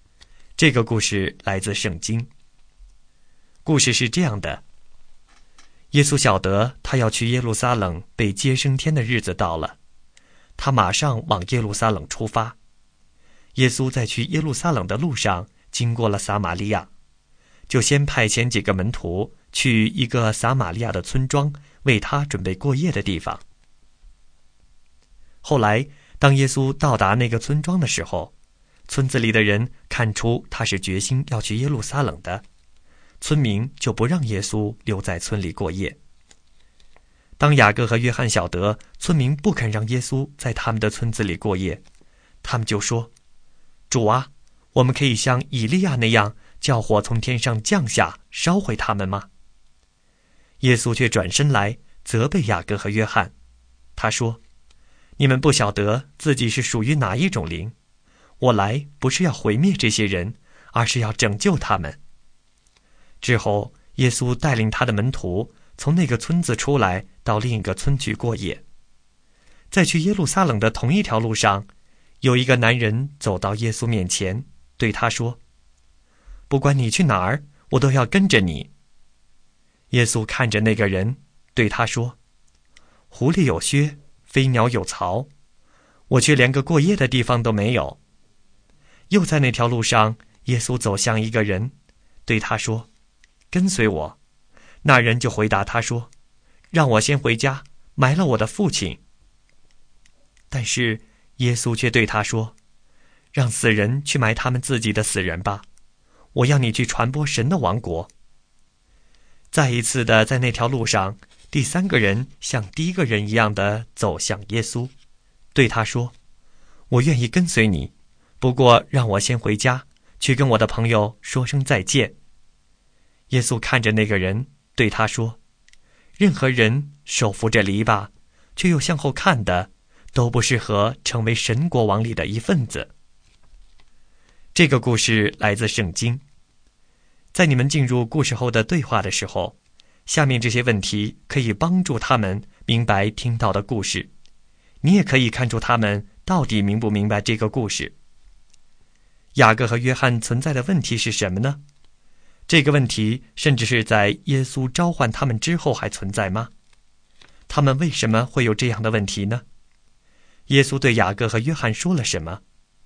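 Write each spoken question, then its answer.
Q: 耶稣对雅各和约翰说了什么?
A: 他责备他们:你们不晓得自己是属于哪一种灵,我来不是要毁灭这些人,而是要拯救他们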